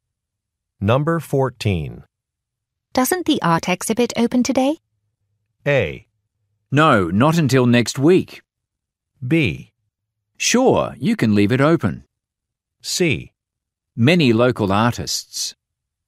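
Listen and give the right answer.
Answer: A: No, not until next week.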